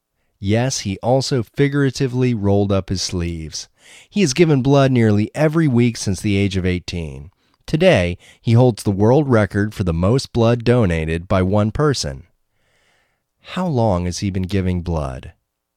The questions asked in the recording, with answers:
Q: How long has he been giving blood?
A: He has been giving blood since the age of 18.